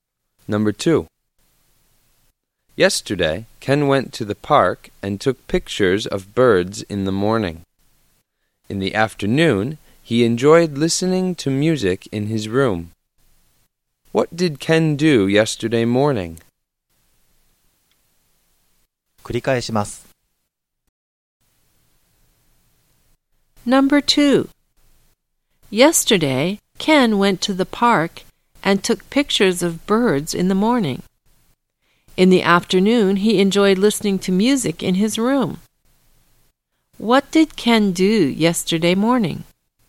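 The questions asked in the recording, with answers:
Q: What did Ken do yesterday morning?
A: He took pictures of birds in the park.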